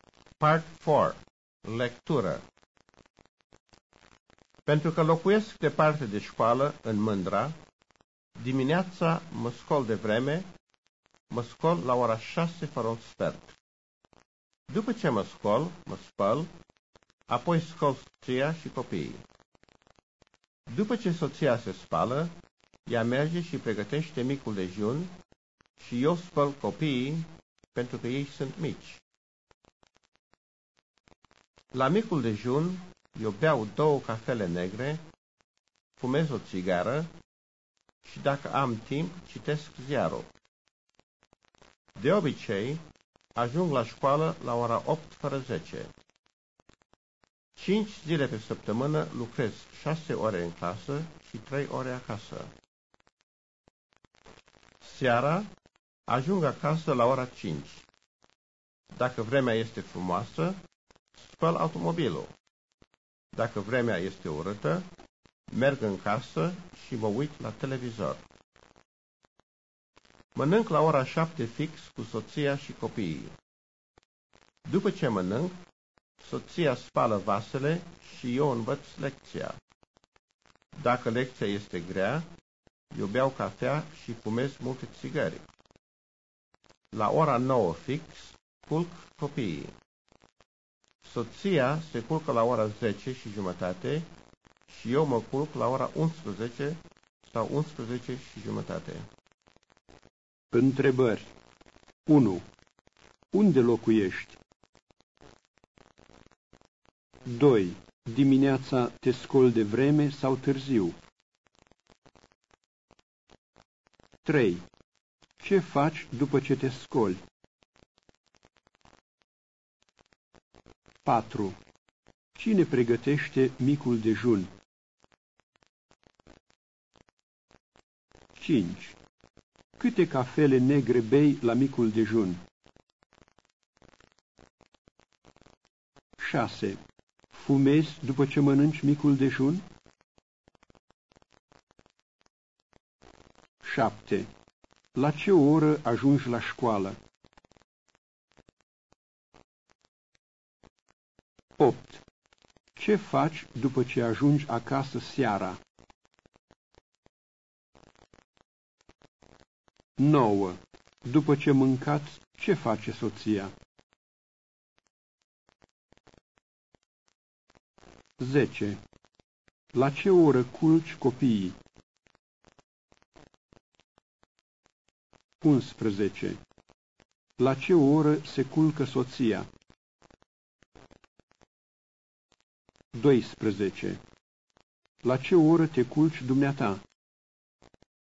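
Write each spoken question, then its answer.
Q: Unde locuiești?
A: În Mândra, departe de școală

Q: Dimineața te scoli de vreme sau târziu?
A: De vreme, la ora 6 fără un sfert

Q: Ce faci după ce te scoli?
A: Mă spăl, apoi scol soția și copiii

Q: Cine pregătește micul dejun?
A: Soția

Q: Câte cafele negre bei la micul dejun?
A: Două

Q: La ce oră ajungi la școală?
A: La ora 8 fără 10

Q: Ce faci după ce ajungi acasă seara?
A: Dacă vremea este frumoasă, spăl automobilul; dacă este urâtă, mă uit la televizor

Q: După ce mâncați, Ce face soția?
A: Spală vasele

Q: La ce oră culci copiii?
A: La ora 9 fix

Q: La ce oră se culcă soția?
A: La ora 10 și jumătate

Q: La ce oră te culci dumneata?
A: La ora 11 sau 11 și jumătate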